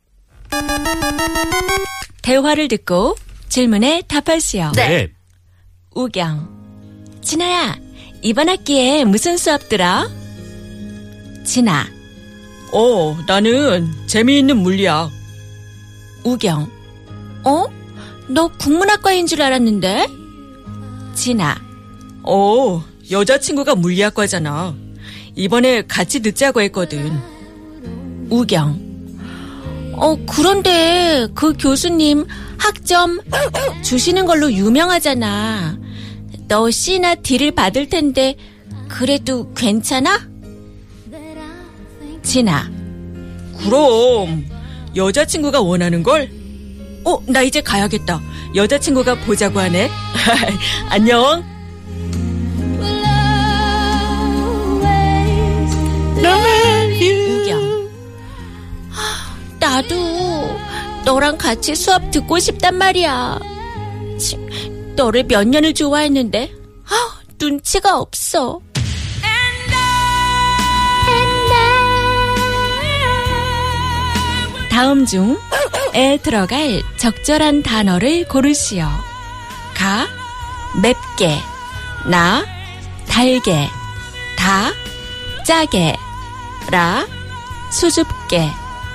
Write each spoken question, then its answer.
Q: 다음 중에 들어갈 적절한 단어를 고르시오. 가, 맵게, 나, 달게, 다, 짜게, 라, 수줍게.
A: It's 다, 작게, in a salty way.